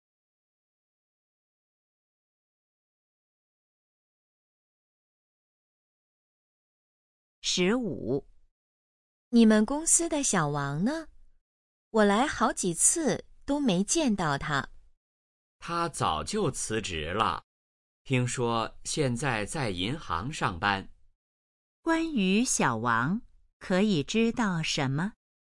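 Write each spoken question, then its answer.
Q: 关于小王,可以知道什么?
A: 他辞职了,现在在银行上班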